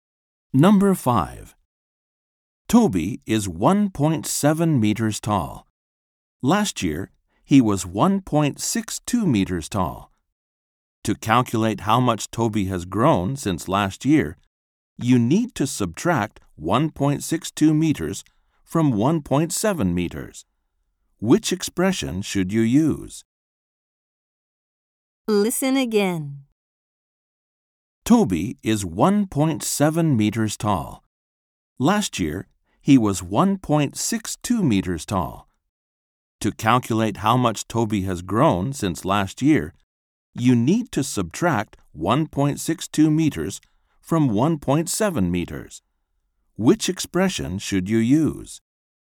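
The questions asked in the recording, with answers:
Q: Which expression should you use?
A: 1.7 − 1.62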